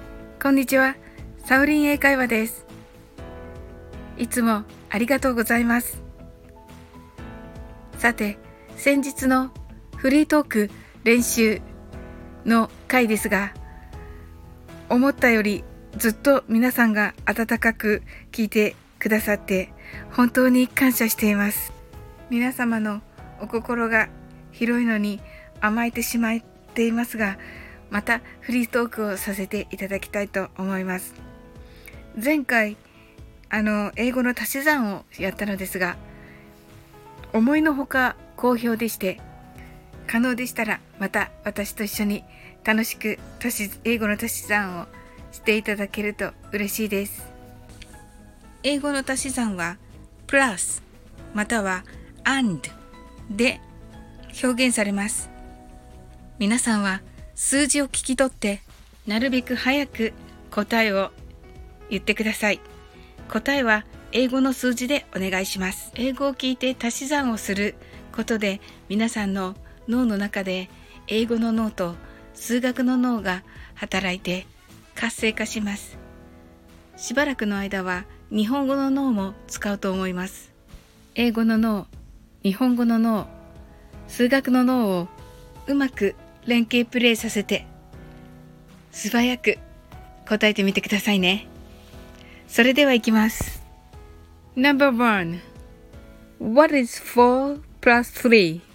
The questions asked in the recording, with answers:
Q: What is 4 plus 3?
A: The answer is 7